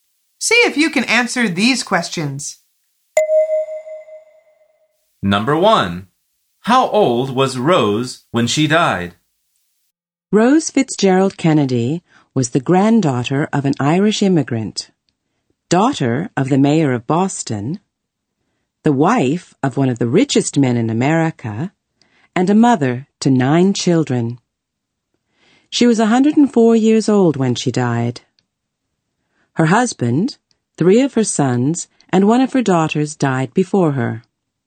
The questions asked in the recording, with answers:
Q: How old was Rose when she died?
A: The answer is 104 years old.